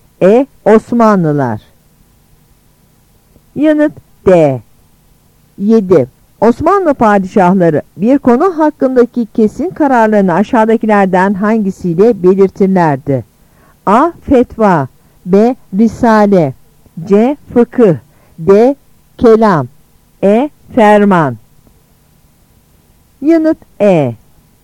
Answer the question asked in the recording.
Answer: Yanıt E.